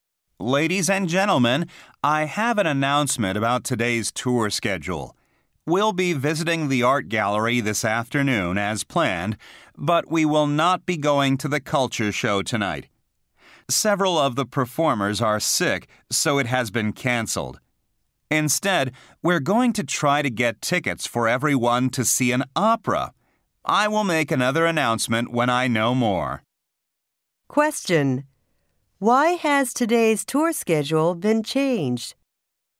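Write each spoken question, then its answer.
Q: Why has today's tour schedule been changed?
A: Several performers in the culture show are sick, so it was canceled.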